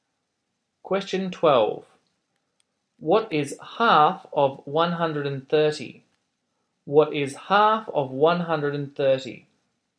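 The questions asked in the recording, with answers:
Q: What is half of 130?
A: 65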